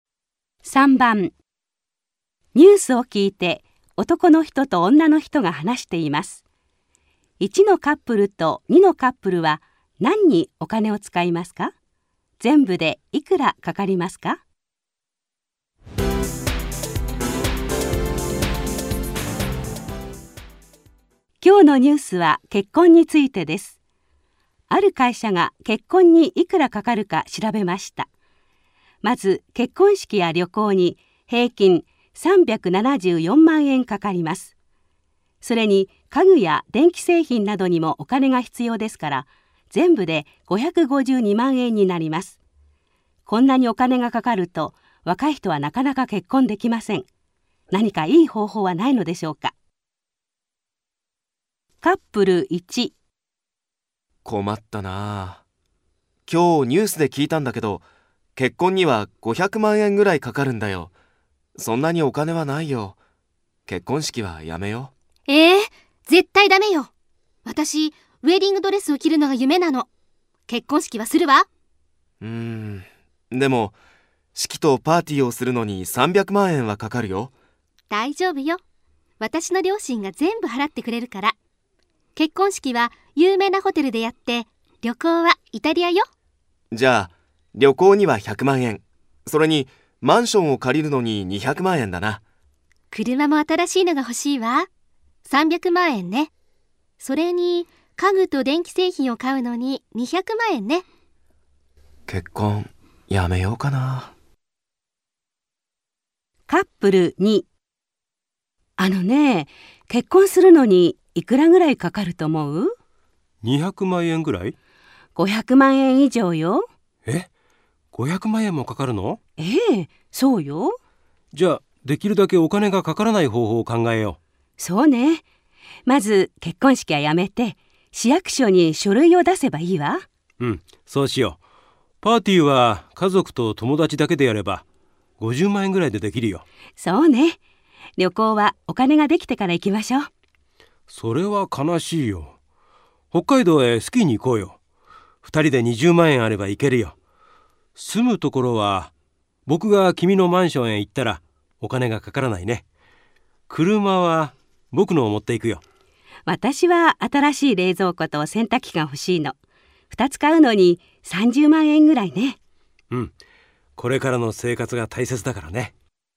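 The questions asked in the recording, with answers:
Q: 1のカップルと2のカップルは何にお金を使いますか?全部でいくらかかりますか?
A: カップル1:結婚式とパーティー(300万円)、イタリア旅行(100万円)、マンション(200万円)、新しい車(300万円)、家具と電気製品(200万円)で全部で1100万円。カップル2:家族と友達だけのパーティー(50万円)、北海道スキー旅行(20万円)、冷蔵庫と洗濯機(30万円)で全部で100万円。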